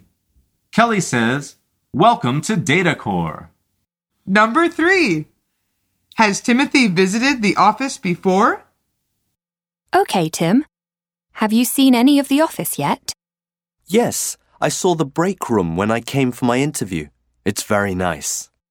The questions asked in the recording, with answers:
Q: Has Timothy visited the office before?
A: The answer is yes.